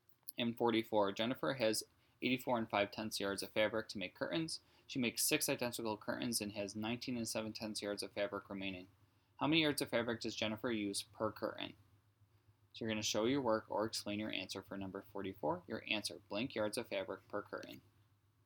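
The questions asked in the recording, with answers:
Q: How many yards of fabric does Jennifer use per curtain?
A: 10.8 (10 8/10) yards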